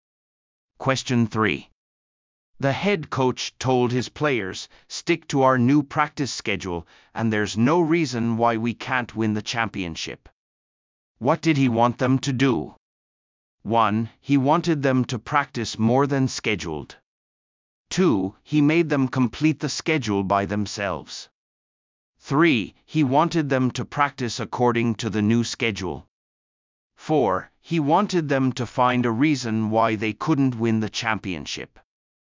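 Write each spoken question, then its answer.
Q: What did he want them to do?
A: 3: He wanted them to practice according to the new schedule.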